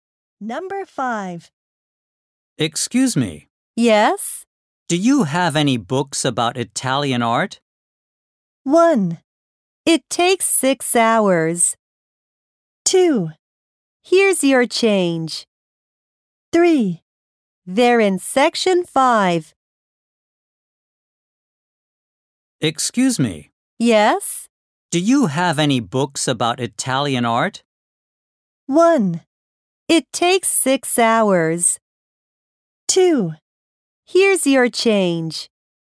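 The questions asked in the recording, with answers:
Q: Do you have any books about Italian art?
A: 3: They're in section 5.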